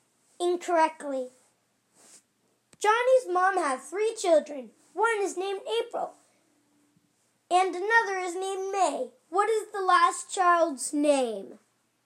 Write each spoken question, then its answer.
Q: What is the last child's name?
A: Johnny.